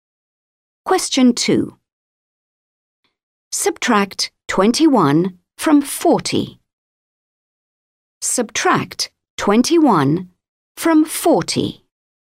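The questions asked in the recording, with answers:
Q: Subtract 21 from 40.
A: 19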